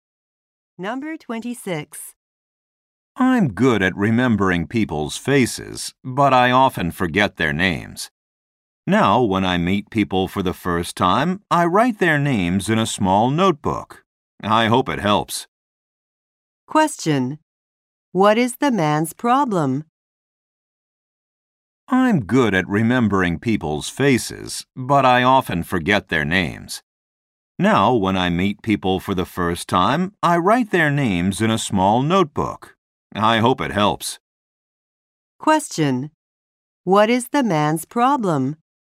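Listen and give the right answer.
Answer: He often forgets people's names.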